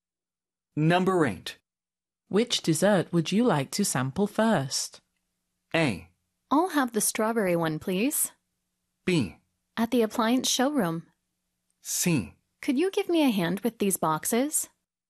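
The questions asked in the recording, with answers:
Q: Which dessert would you like to sample first?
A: A: I'll have the strawberry one, please.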